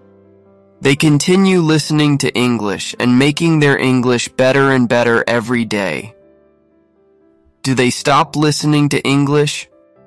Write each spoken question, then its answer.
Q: Do they stop listening to English?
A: No, they don't. They continue listening to English.